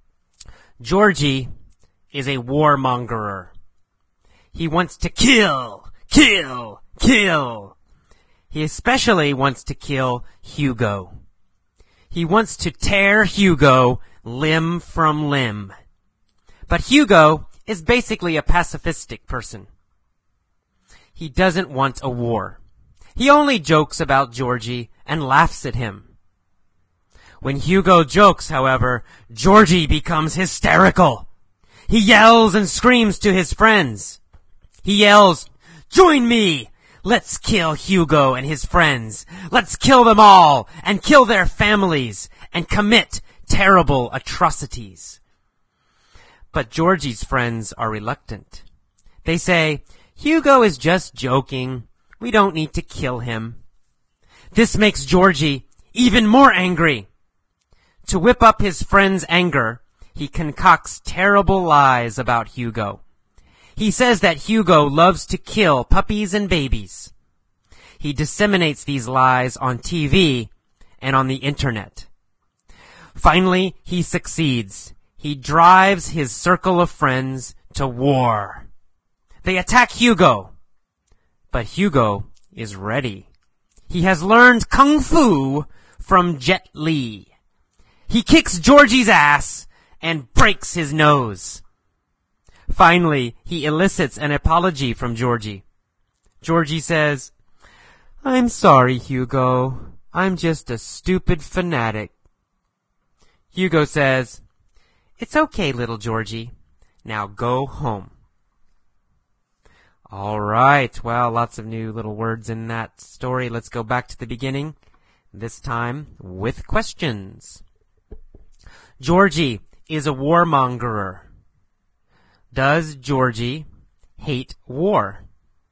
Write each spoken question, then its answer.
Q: Does Georgie hate war?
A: No, the opposite. Georgie loves war.